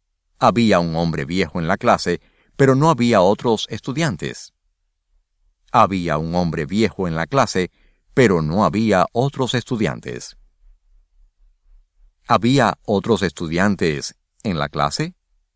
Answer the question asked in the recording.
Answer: No, no había otros estudiantes en la clase.